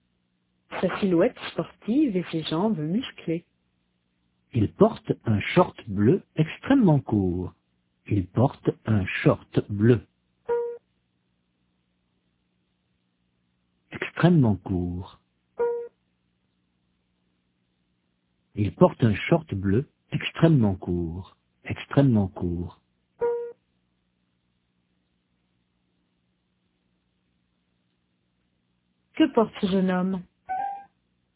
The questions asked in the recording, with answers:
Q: Que porte ce jeune homme?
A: Un short bleu extrêmement court.